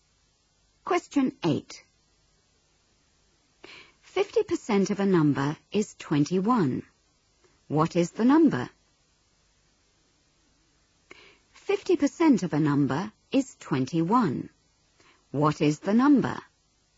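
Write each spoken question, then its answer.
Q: 50% of a number is 21. What is the number?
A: 42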